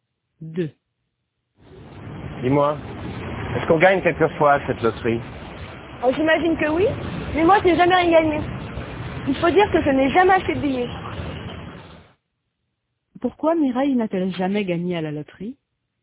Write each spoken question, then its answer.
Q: Pourquoi Mireille n'a-t-elle jamais gagné à la loterie?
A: Parce qu'elle n'a jamais acheté de billets.